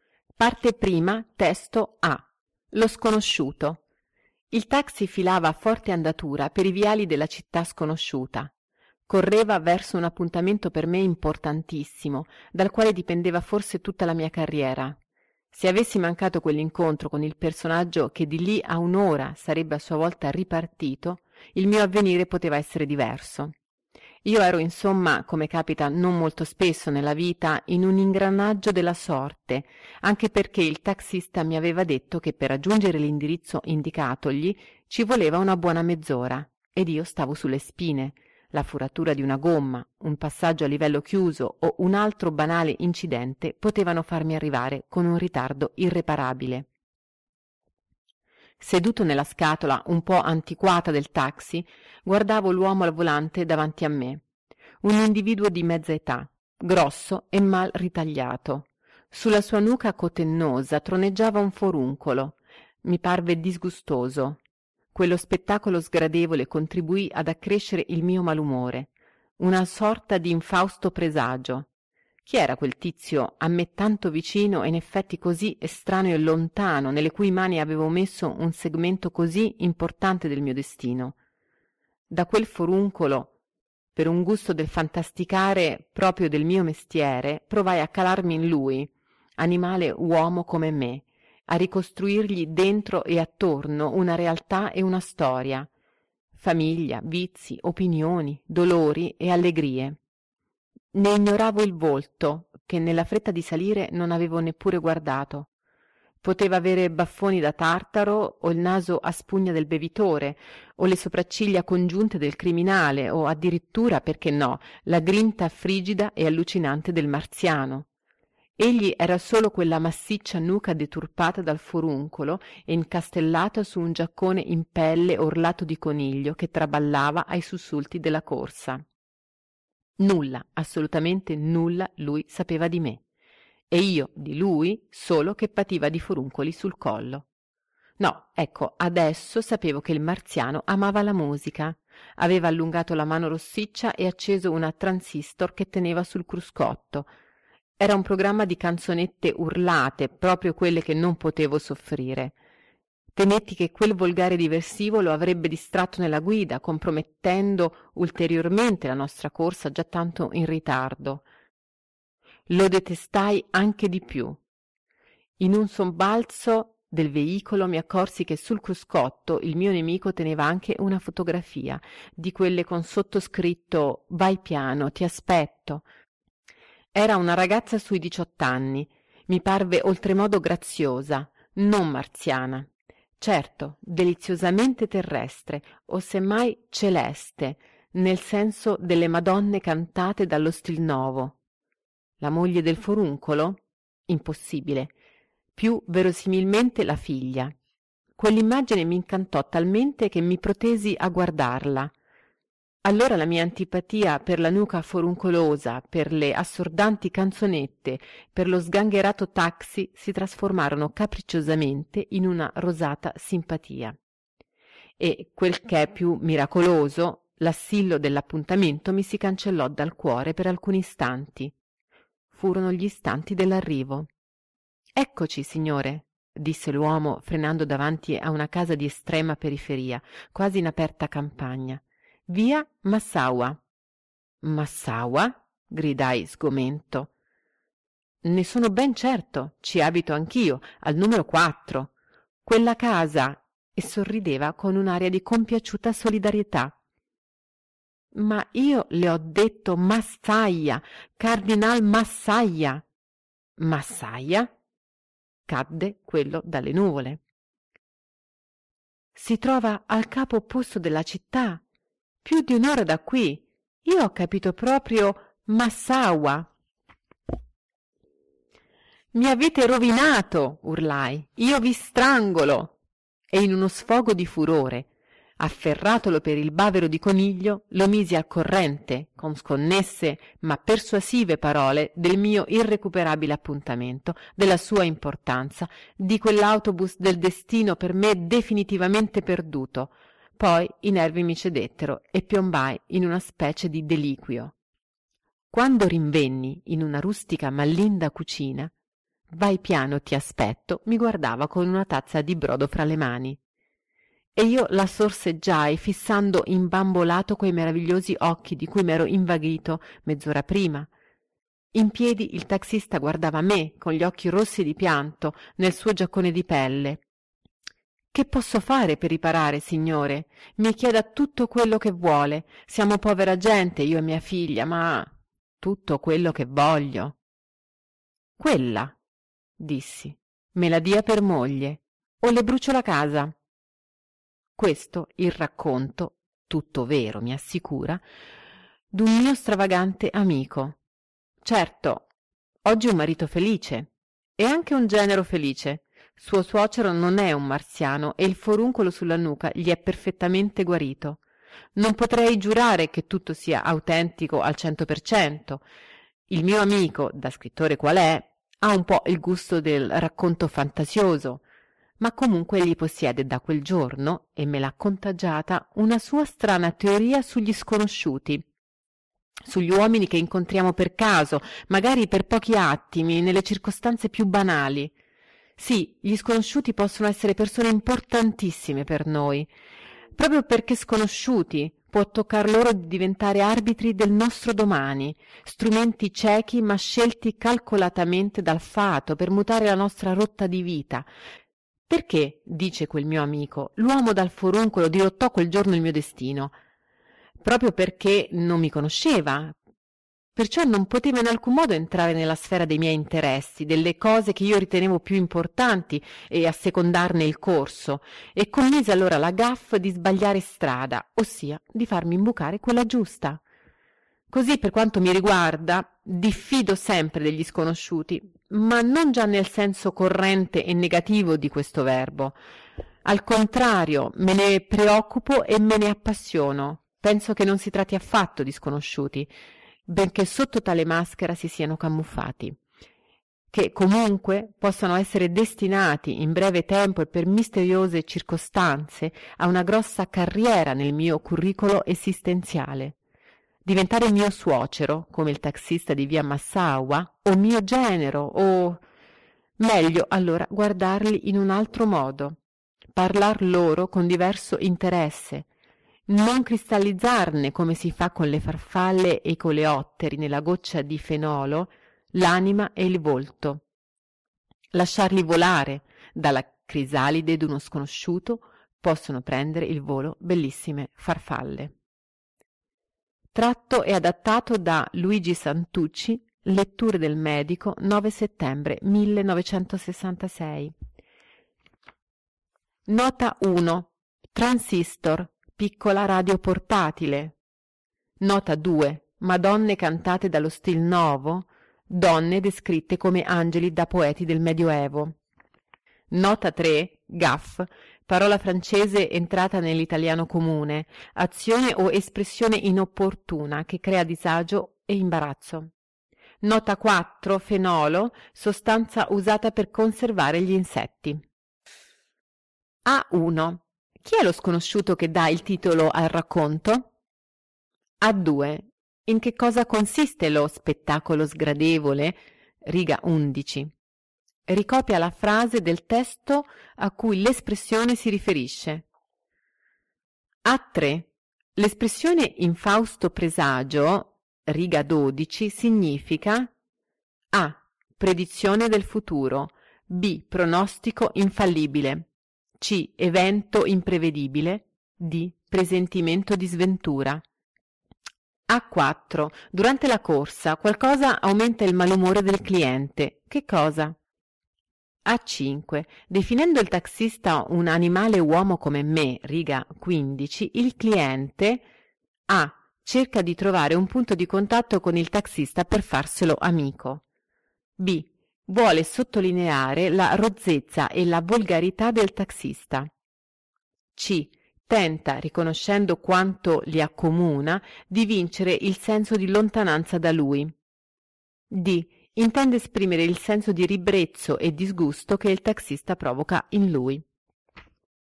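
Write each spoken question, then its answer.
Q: Chi è lo sconosciuto che dà il titolo al racconto?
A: Il taxista

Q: In che cosa consiste lo spettacolo sgradevole?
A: Sulla sua nuca cotennosa troneggiava un foruncolo.

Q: L'espressione in Fausto Presagio, riga 12, significa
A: D: Presentimento di sventura

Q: Definendo il taxista un animale uomo come me, riga 15, il cliente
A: C: Tenta, riconoscendo quanto li accomuna, di vincere il senso di lontananza da lui.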